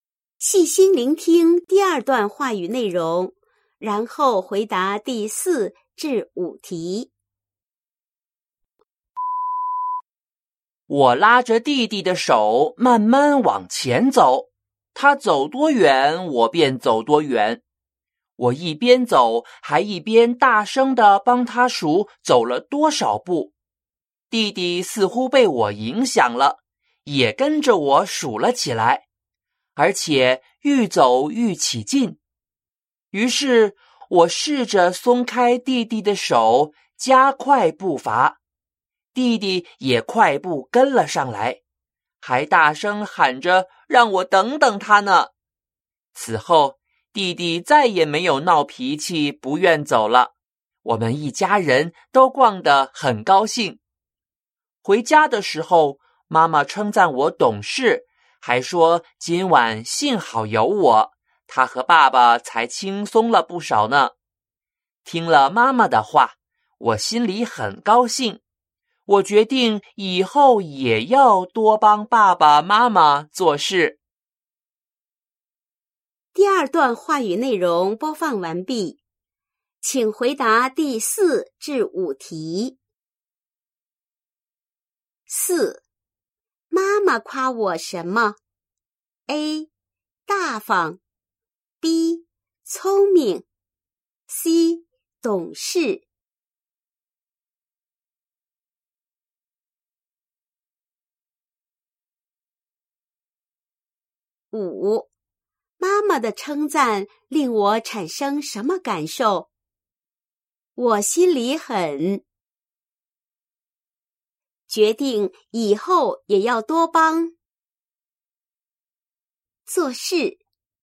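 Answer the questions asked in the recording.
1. C: 懂事
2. 高兴;决定以后也要多帮爸爸妈妈做事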